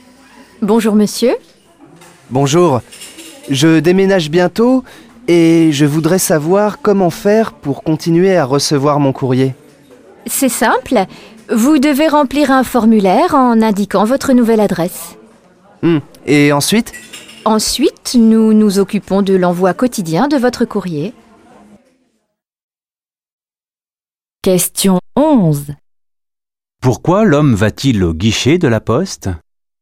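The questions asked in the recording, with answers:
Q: Pourquoi l'homme va-t-il au guichet de la poste ?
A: Pour faire suivre son courrier à sa nouvelle adresse, car il déménage bientôt.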